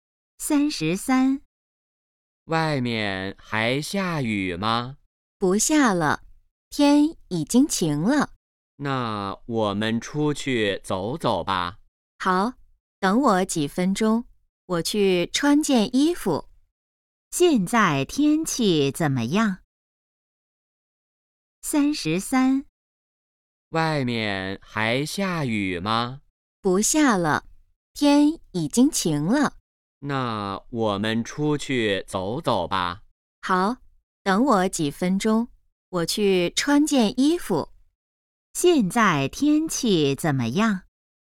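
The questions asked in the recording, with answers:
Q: 现在天气怎么样?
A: 晴了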